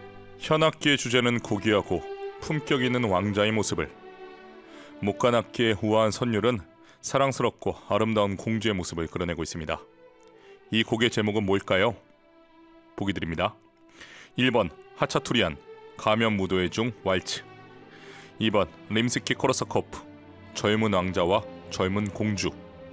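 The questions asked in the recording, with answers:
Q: 이 곡의 제목은 뭘까요?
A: 2: 림스키코르사코프, 젊은 왕자와 젊은 공주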